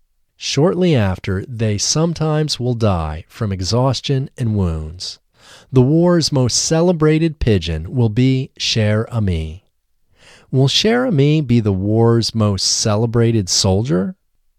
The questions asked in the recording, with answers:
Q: Will Cher Ami be the war's most celebrated soldier?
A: No, Cher Ami won't be the war's most celebrated soldier. Cher Ami will be the war's most celebrated pigeon.